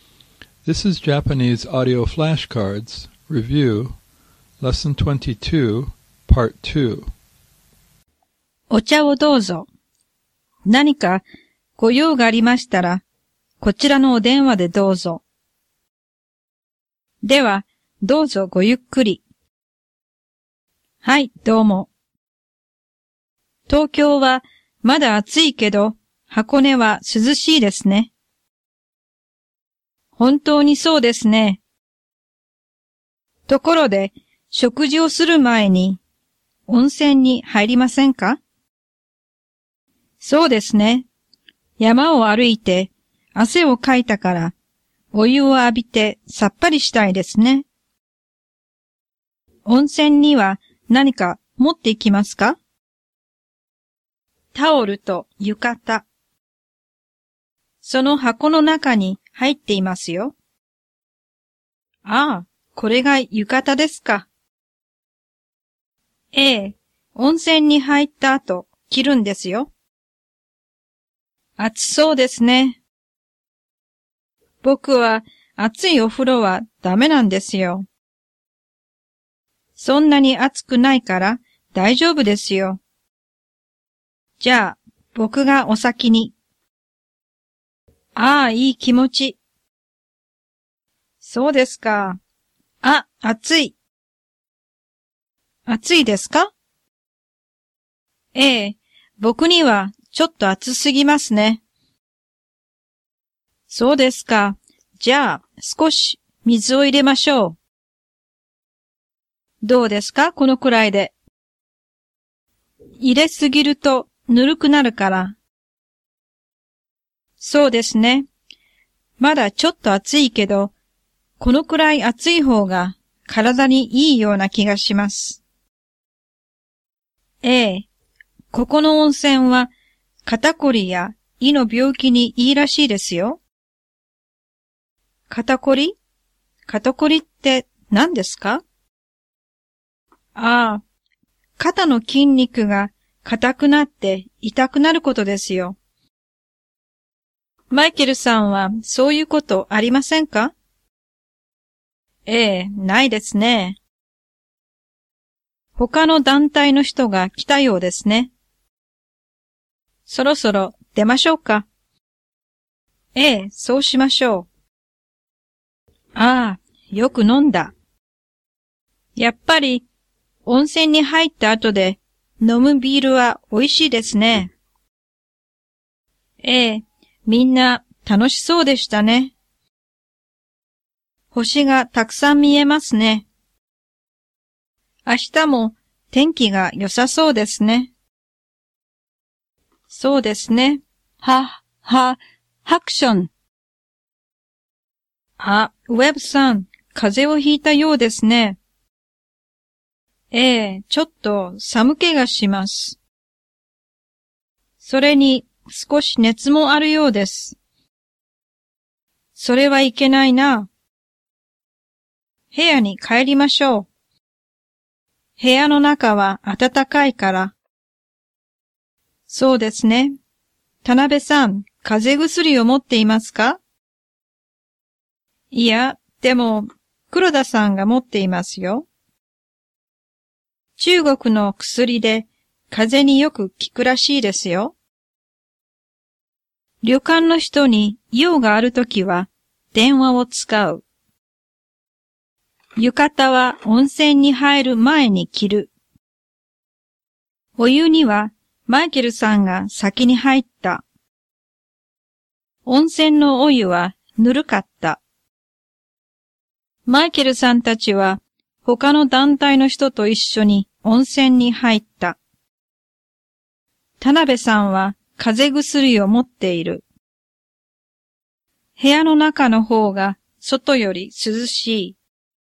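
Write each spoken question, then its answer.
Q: 旅館の人に用があるときは電話を使う。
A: 正しい

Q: 浴衣は温泉に入る前に着る。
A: 正しくない(温泉に入った後で着る)

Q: 温泉のお湯はぬるかった。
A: 正しくない(熱かった)

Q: マイケルさんたちは他の団体の人と一緒に温泉に入った。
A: 正しくない

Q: 田辺さんは風邪薬を持っている。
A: 正しくない(黒田さんが持っている)

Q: 部屋の中の方が外より涼しい。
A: 正しくない(部屋の中は暖かい)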